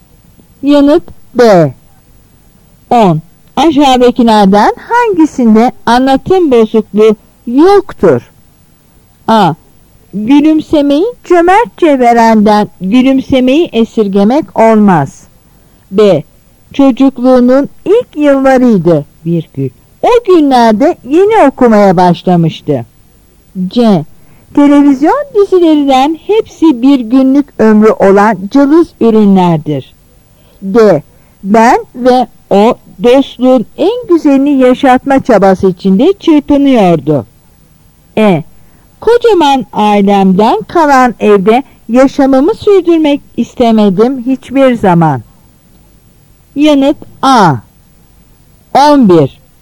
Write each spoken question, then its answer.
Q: Aşağıdakilerden hangisinde anlatım bozukluğu yoktur?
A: Yanıt A.